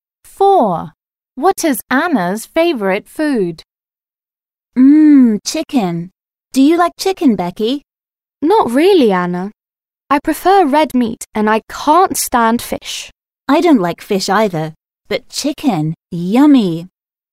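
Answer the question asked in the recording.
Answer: Chicken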